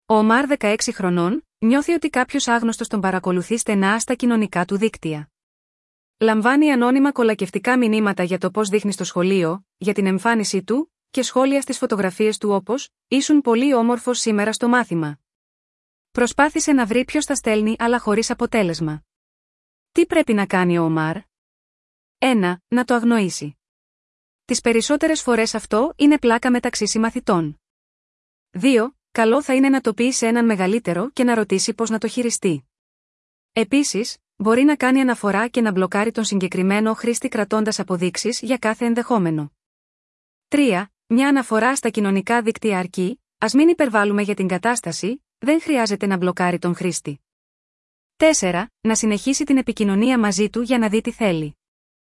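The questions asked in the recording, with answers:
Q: Τι πρέπει να κάνει ο Ομάρ?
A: 2: Καλό θα είναι να το πει σε έναν μεγαλύτερο και να ρωτήσει πώς να το χειριστεί.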